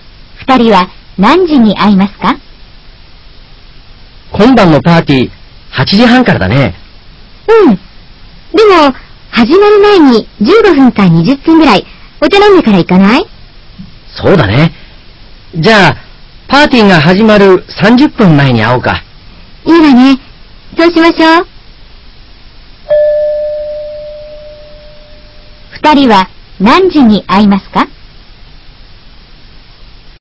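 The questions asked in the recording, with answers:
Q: 二人は何時に会いますか?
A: 8時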